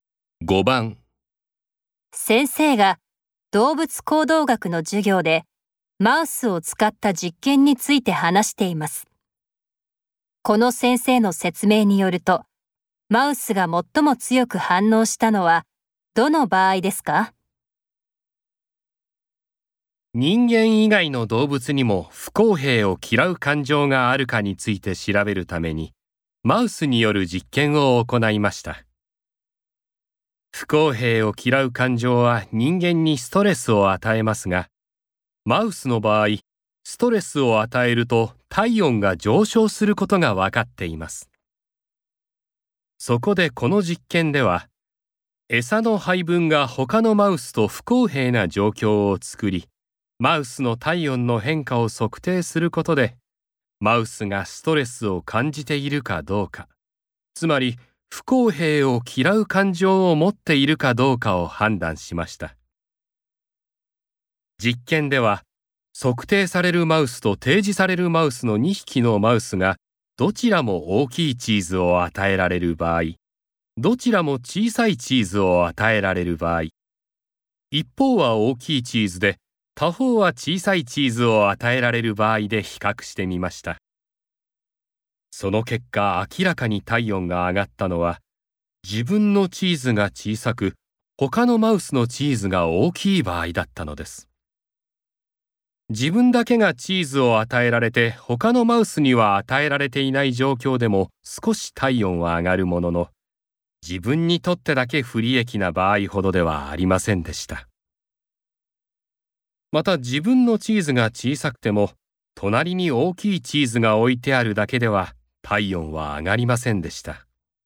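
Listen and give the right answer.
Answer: 自分のチーズが小さく、他のマウスのチーズが大きい場合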